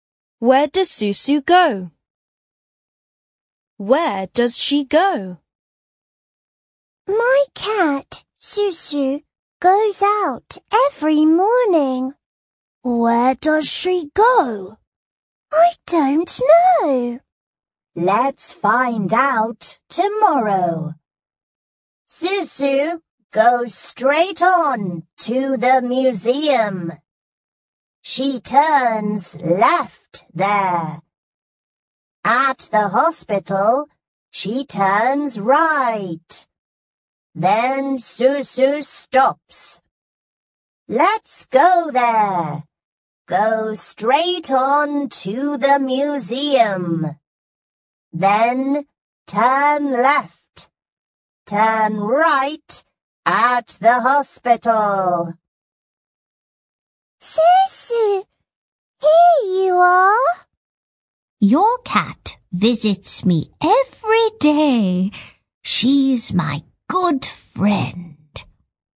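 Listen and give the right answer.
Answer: She visits a friend every day (straight on to the museum, left, then right at the hospital).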